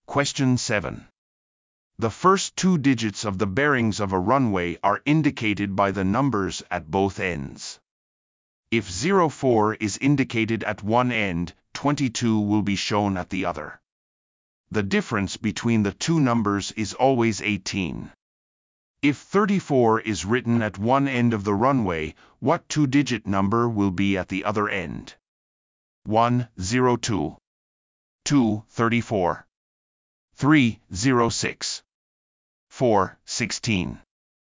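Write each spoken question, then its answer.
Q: If 34 is written at one end of the runway, what two-digit number will be at the other end?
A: 4: 16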